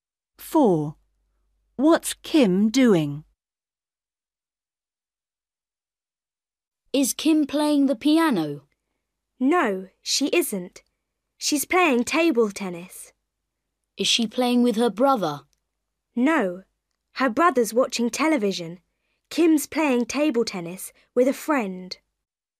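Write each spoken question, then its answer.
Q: What's Kim doing?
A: playing table tennis with a friend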